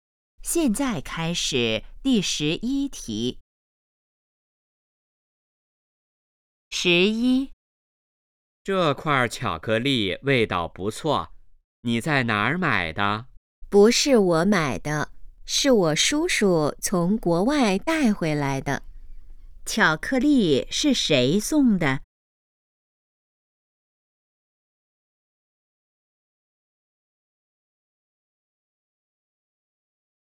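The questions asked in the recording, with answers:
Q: 巧克力是谁送的?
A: 叔叔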